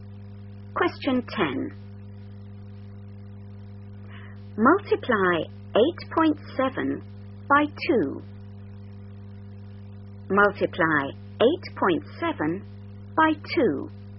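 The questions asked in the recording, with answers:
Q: Multiply 8.7 by 2.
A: 17.4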